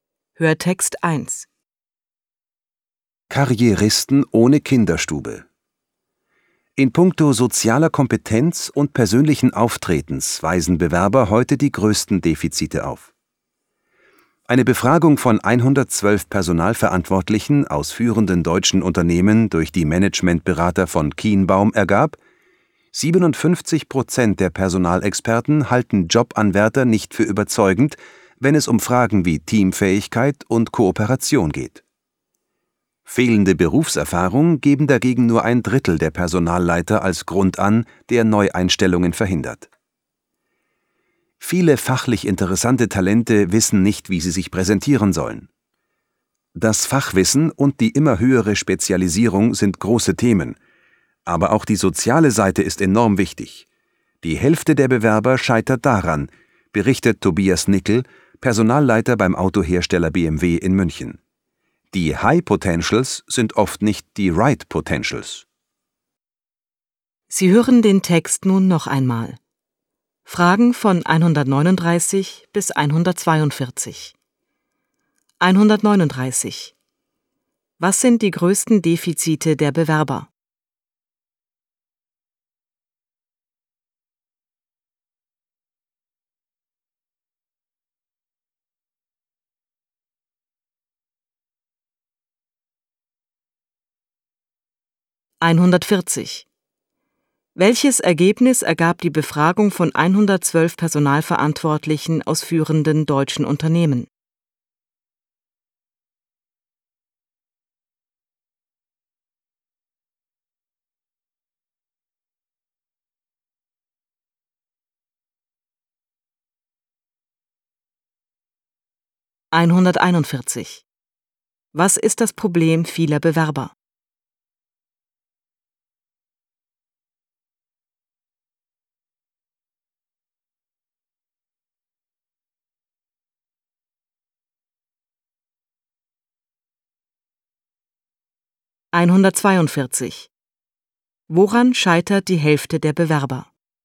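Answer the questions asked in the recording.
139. Soziale Kompetenz und persönliches Auftreten
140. 57% halten Jobanwärter bei Teamfähigkeit und Kooperation nicht für überzeugend
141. Sie wissen nicht, wie sie sich präsentieren sollen
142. An der sozialen Seite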